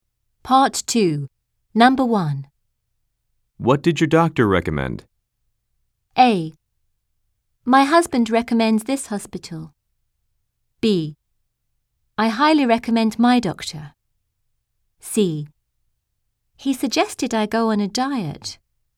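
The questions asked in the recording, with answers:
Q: What did your doctor recommend?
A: C: He suggested I go on a diet.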